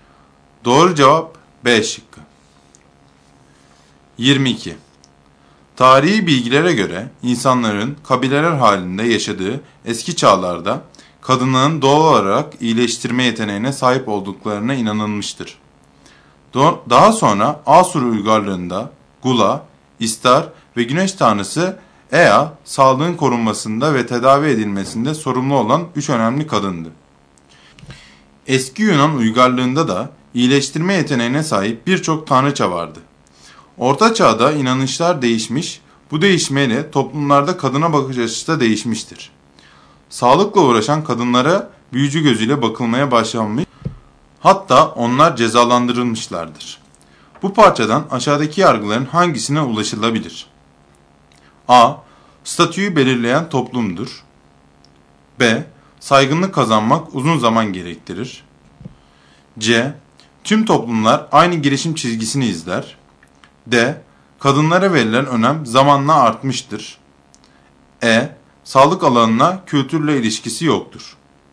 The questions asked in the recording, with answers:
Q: Bu parçadan aşağıdaki yargıların hangisine ulaşılabilir?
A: Doğru seçenek A şıkkı.